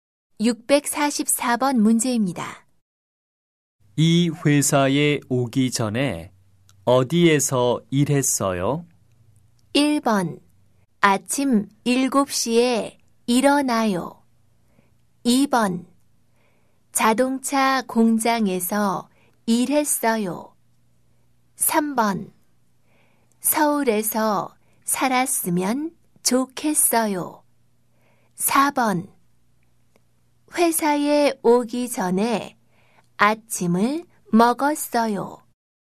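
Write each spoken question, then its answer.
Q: 이 회사에 오기 전에 어디에서 일했어요?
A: 2: 자동차 공장에서 일했어요.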